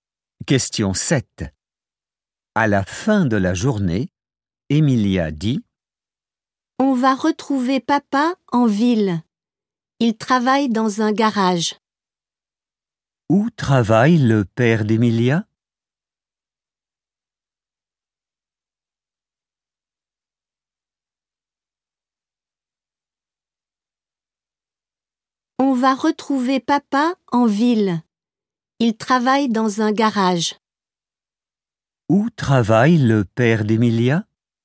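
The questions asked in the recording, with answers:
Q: Où travaille le père d'Emilia?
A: Dans un garage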